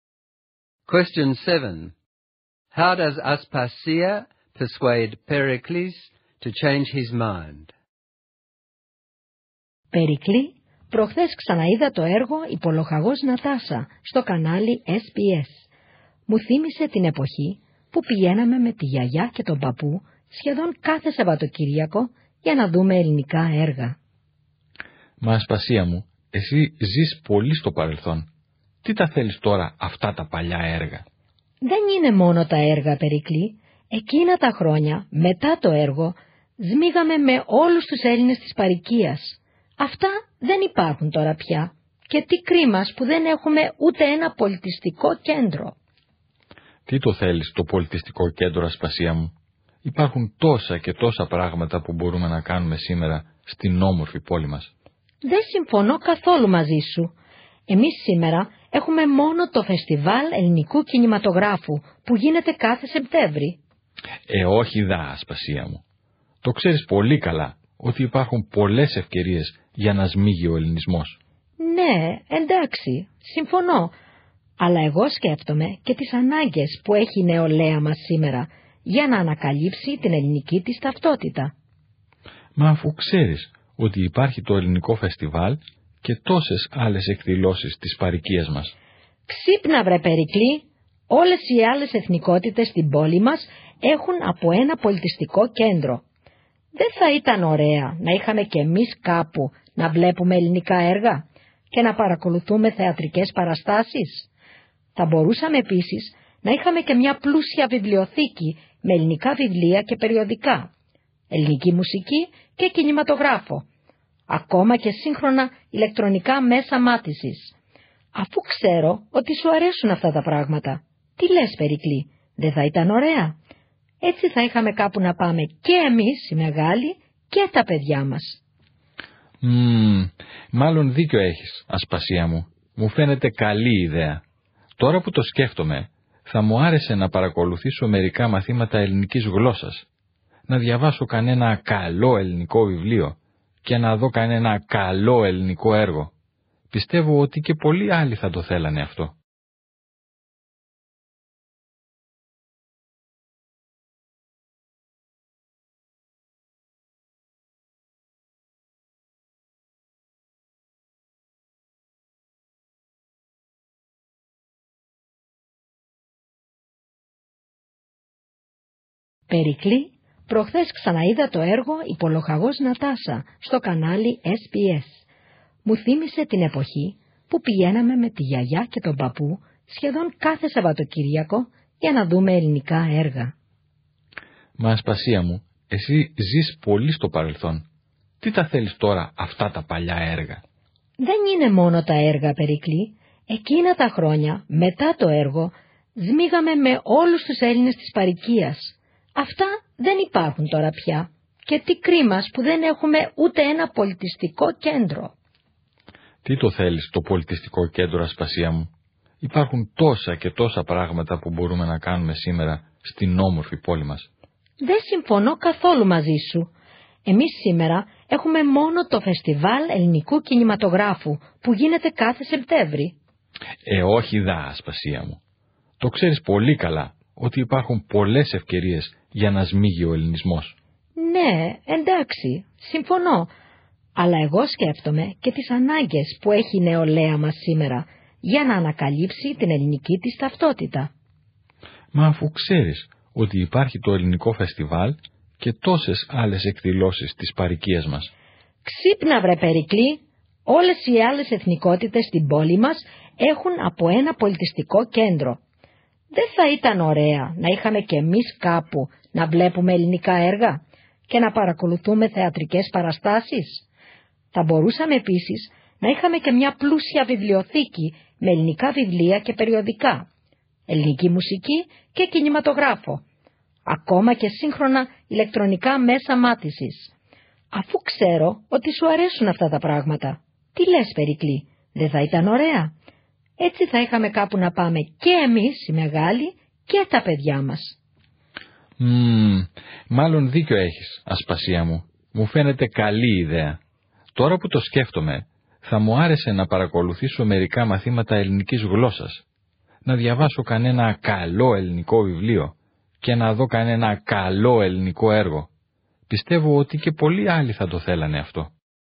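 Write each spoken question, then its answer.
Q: How does Aspasia persuade Pericles to change his mind?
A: She recalls past community gatherings, notes that other ethnic groups have cultural centres, mentions young people's need for Greek identity, and appeals to his interests: films, theatre, a library and music.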